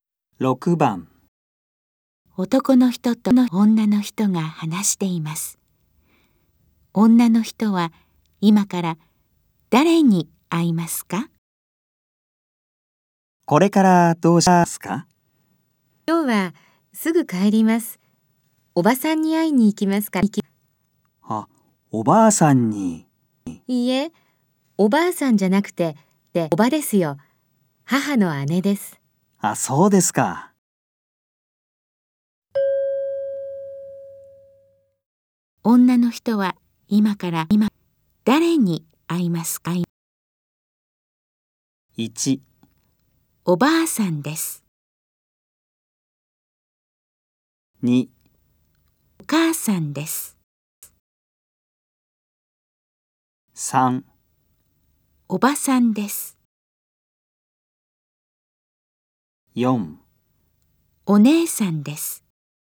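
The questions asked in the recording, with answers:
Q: 女の人は今から今誰に会いますか?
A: 3: おばさんです。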